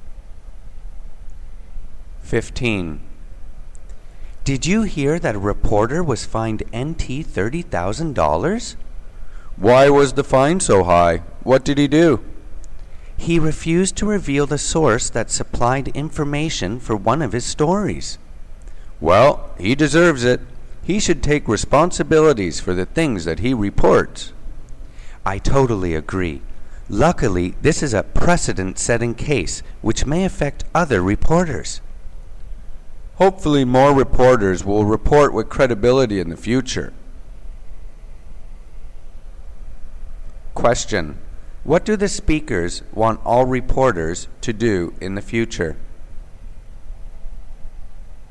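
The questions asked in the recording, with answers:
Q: What do the speakers want all reporters to do in the future?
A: Report with credibility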